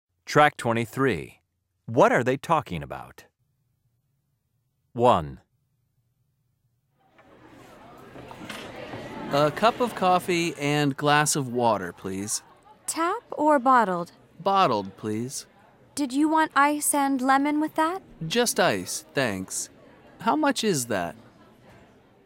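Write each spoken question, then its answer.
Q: What are they talking about?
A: ordering drinks in a café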